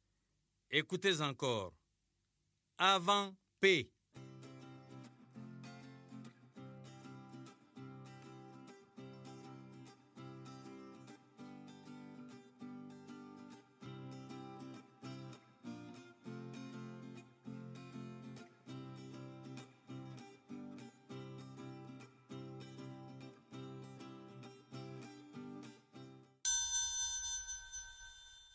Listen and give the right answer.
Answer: Bravo les élèves, j'espère que vous avez trouvé la lettre O.